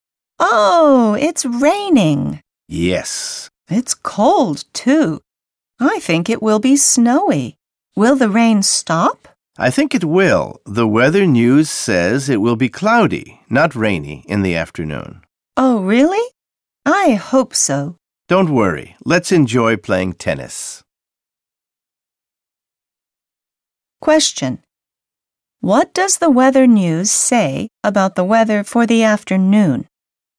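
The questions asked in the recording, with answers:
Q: What does the weather news say about the weather for the afternoon?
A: It will be cloudy, not rainy.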